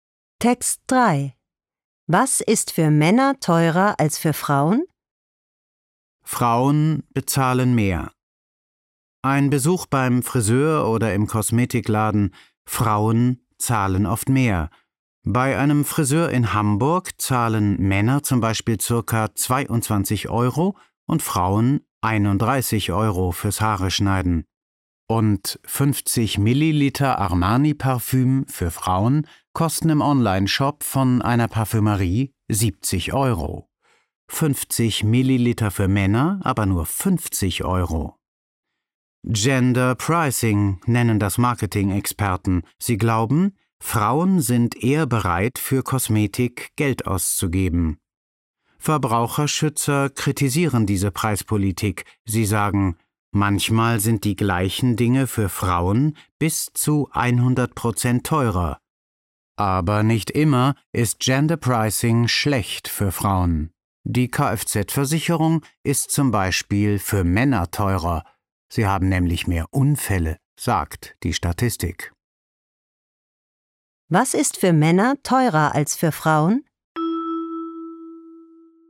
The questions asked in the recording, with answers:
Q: Was ist für Männer teurer als für Frauen?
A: Die Kfz-Versicherung.